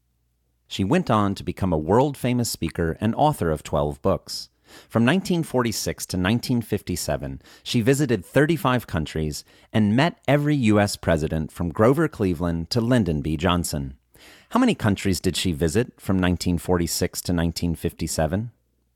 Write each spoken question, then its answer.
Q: How many countries did she visit from 1946 to 1957?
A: She visited 35 countries from 1946 to 1957.